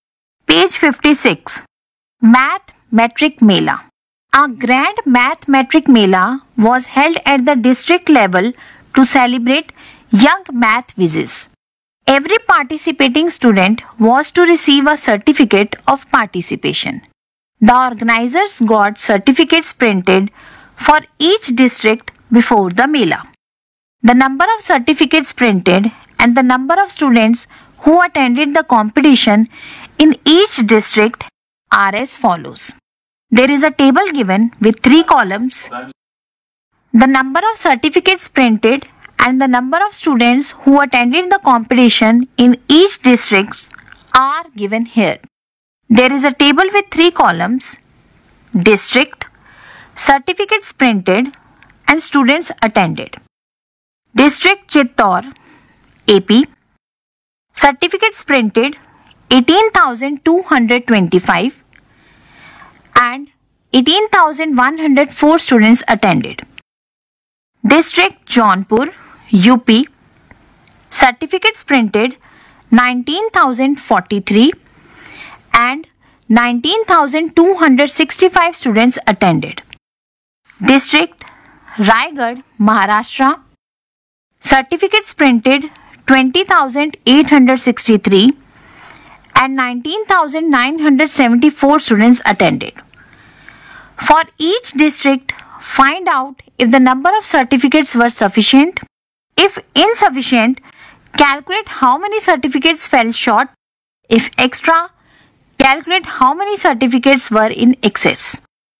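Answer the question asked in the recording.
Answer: Chittor: 121 extra; Jaunpur: 222 short; Raigarh: 889 extra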